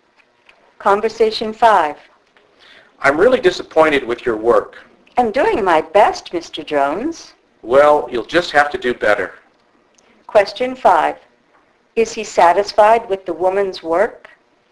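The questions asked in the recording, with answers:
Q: Is he satisfied with the woman's work?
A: No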